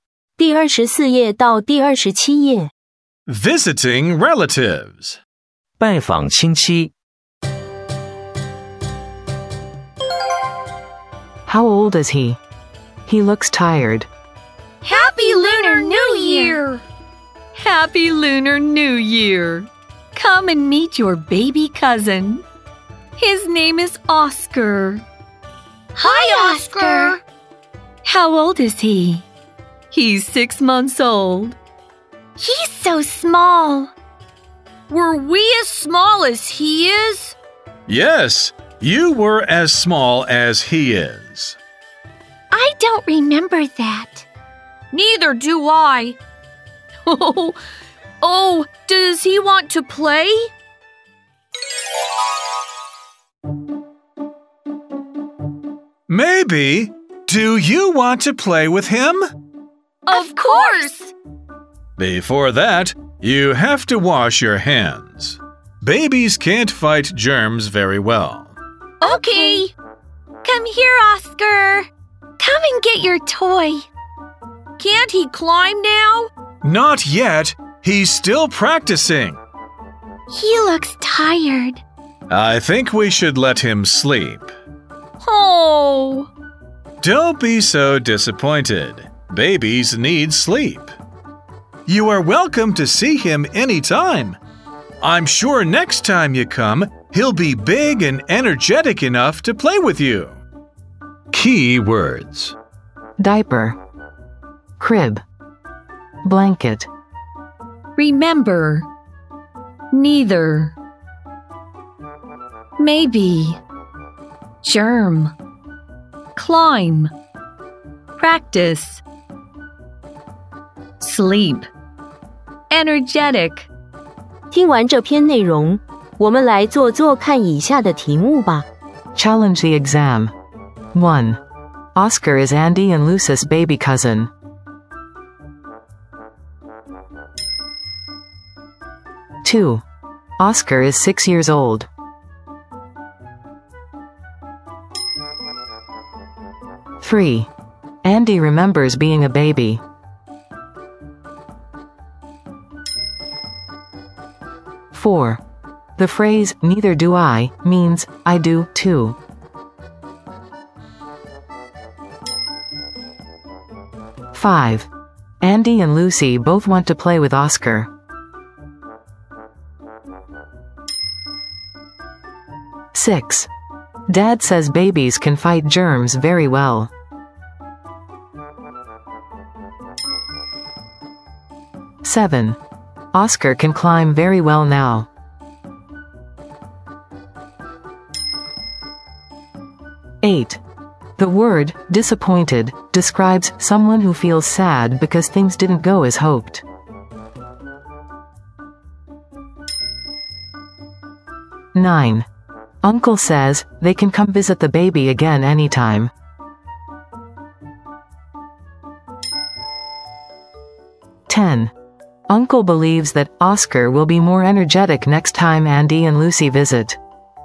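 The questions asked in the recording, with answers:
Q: Oscar is 6 years old.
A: False

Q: Andy remembers being a baby.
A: False

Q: The phrase, neither do I, means, I do, too.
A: False

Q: Dad says babies can fight germs very well.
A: False

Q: Oscar can climb very well now.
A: False

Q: The word, disappointed, describes someone who feels sad because things didn't go as hoped.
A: True

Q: Uncle says, they can come visit the baby again anytime.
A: True

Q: Uncle believes that Oscar will be more energetic next time Andy and Lucy visit.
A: True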